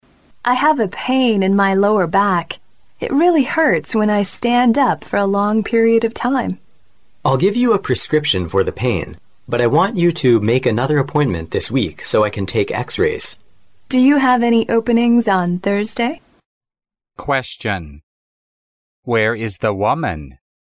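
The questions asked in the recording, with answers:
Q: Question. Where is the woman?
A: At a doctor's office

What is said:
[听力原文] W: I have a pain in my lower back. It really hurts when I stand up for a long period of time. M: I'll give a prescription for the pain. But I want you to make another appointment this week, so I can take X-rays. W: Do you have any openings on Thursday?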